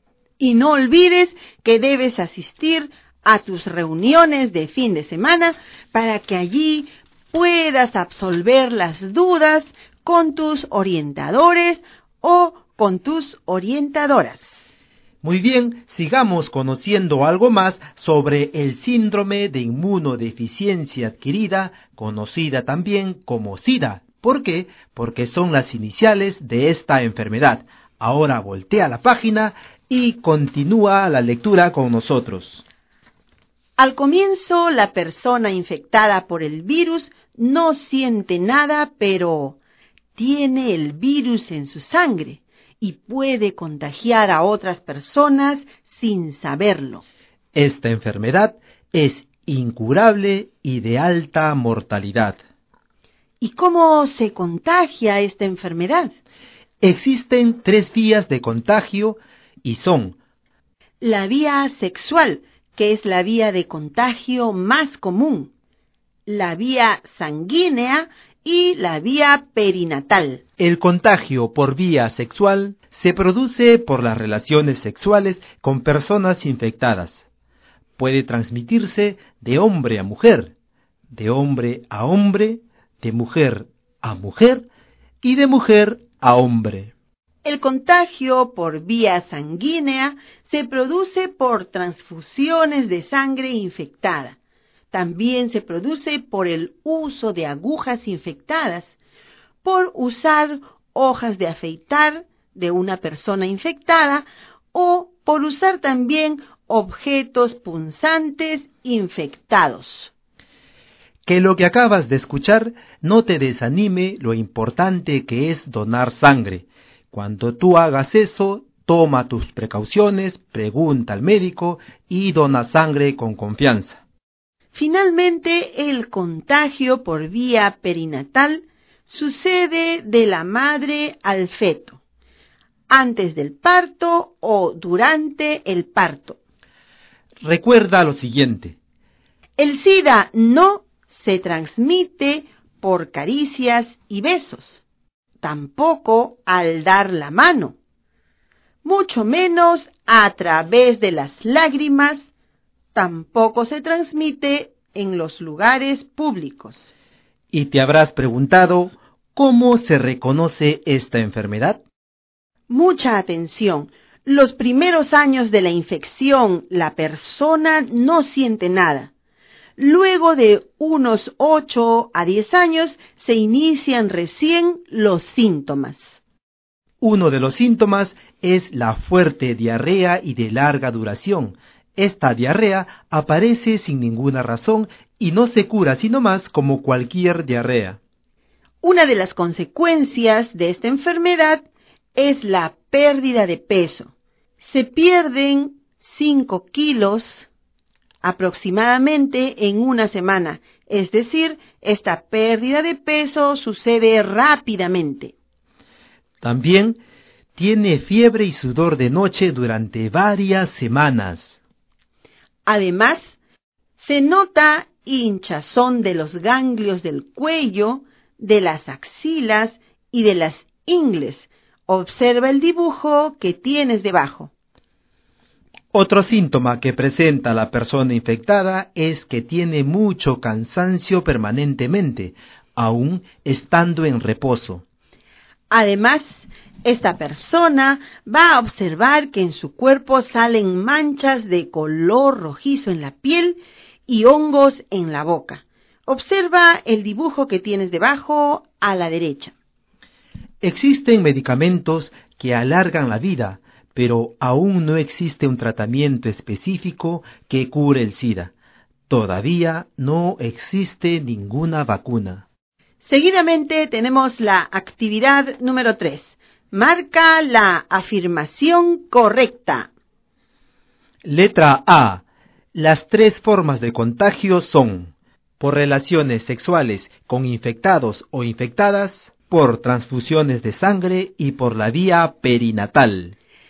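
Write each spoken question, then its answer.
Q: Marca la afirmación correcta.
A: A: Las tres formas de contagio son por relaciones sexuales con infectados o infectadas, por transfusiones de sangre y por la vía perinatal.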